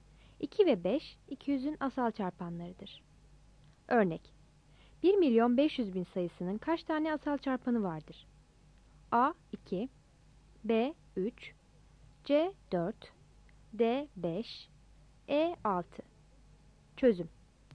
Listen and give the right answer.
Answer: Yanıt B'dir.